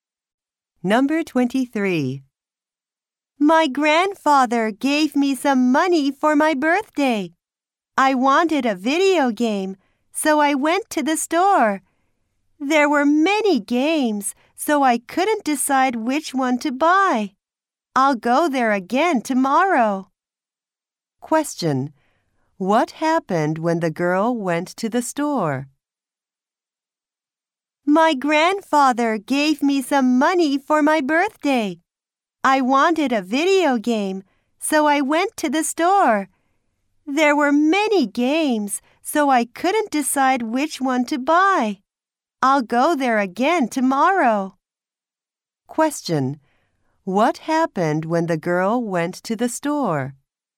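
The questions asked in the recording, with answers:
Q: What happened when the girl went to the store?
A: She couldn't decide which game to buy.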